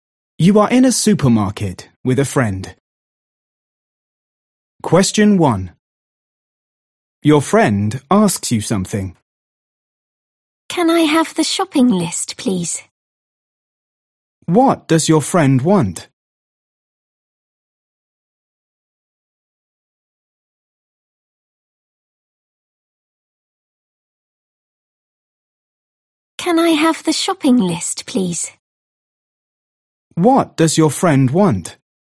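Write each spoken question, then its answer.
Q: What does your friend want?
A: the shopping list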